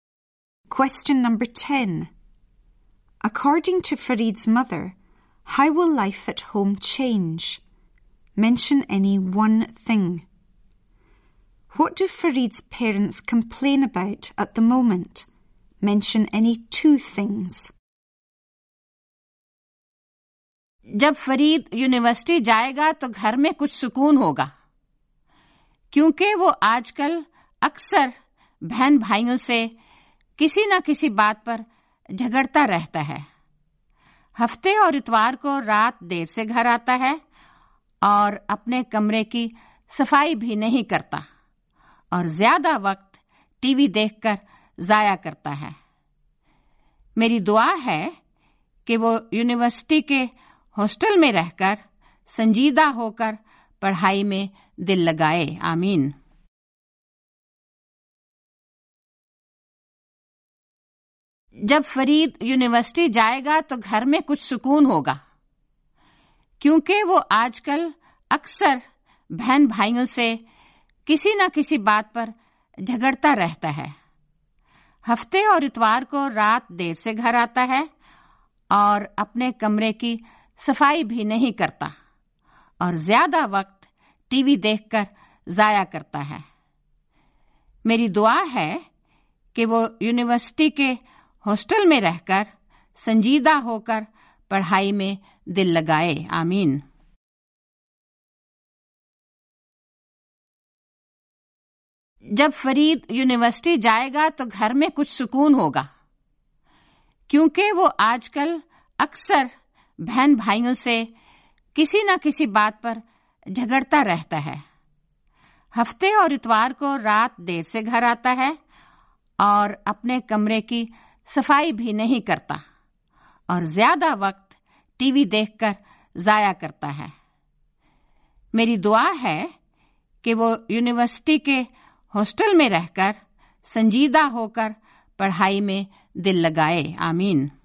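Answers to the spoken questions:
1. It will be more peaceful
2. He fights with siblings, comes home late at weekends, doesn't clean his room, wastes time watching TV (any two)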